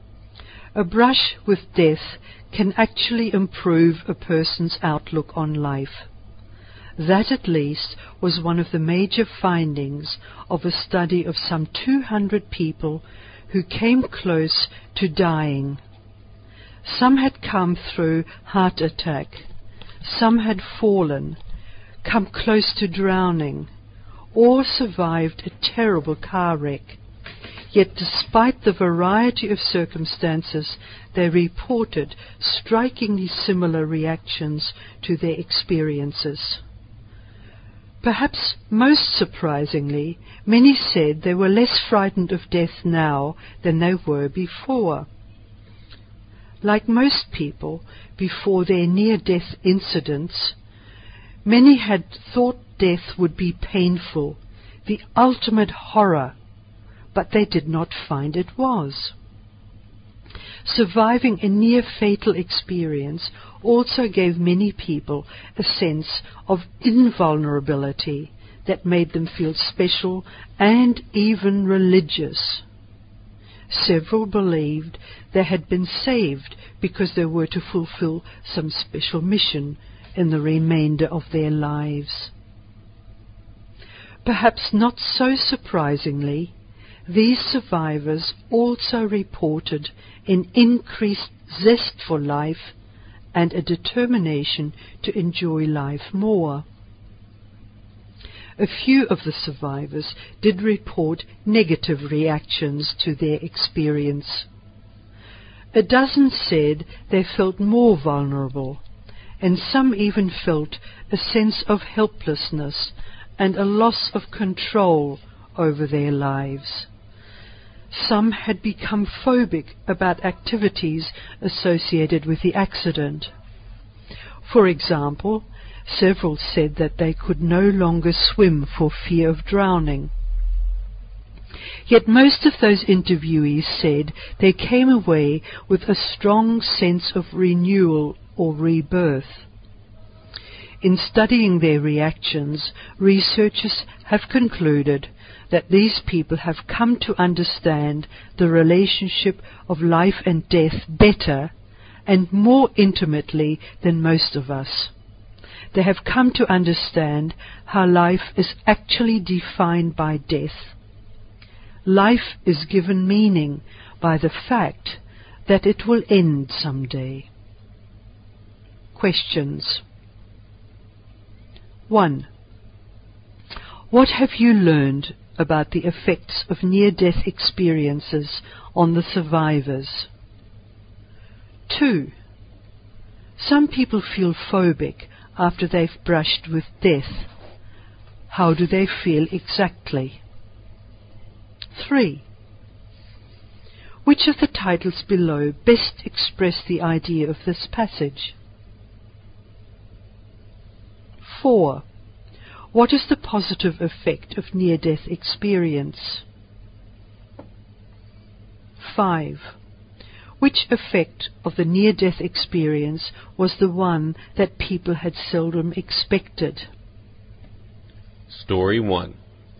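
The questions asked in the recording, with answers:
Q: How do they feel exactly?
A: Afraid of activities linked to the accident, e.g. swimming for fear of drowning

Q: What is the positive effect of near-death experience?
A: Greater zest for life and less fear of death

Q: Which effect of the near-death experience was the one that people had seldom expected?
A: They were less frightened of death than before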